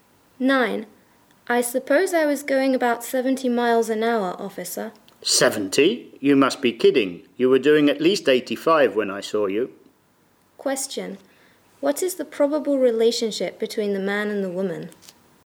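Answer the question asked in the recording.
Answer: Driver and police officer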